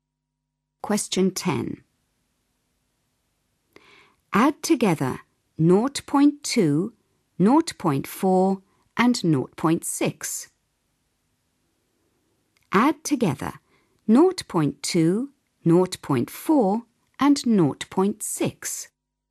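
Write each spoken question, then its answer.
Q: Add together 0.2, 0.4 and 0.6.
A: 1.2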